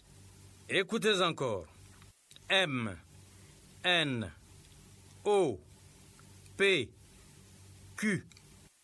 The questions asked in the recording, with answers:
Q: M, N, O, P, Q.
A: j'espère que les élèves ont écrit R.